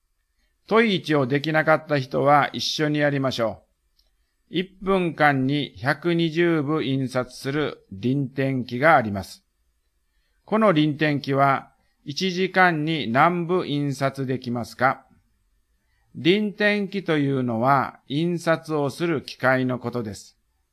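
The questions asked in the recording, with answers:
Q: 1分間に120部印刷する輪転機があります。 この輪転機は1時間に何部印刷できますか?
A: 7200部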